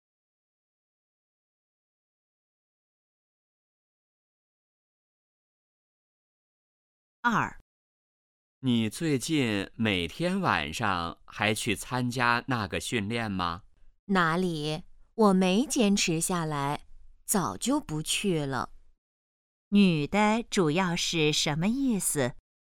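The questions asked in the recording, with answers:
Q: 女的主要是什么意思?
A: 她早就不去参加训练了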